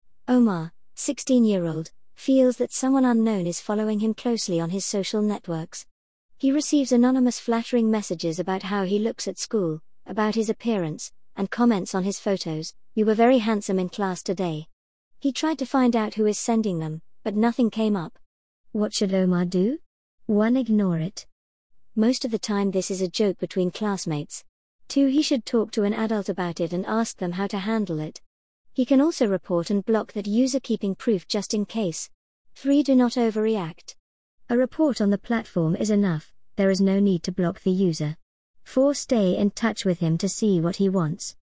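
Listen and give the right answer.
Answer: 2: He should talk to an adult about it and ask them how to handle it. He can also report and block that user, keeping proof just in case.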